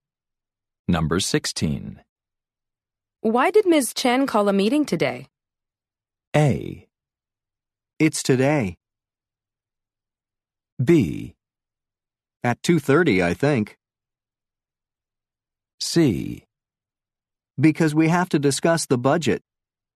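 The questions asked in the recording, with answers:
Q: Why did Ms. Chen call a meeting today?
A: C: Because we have to discuss the budget.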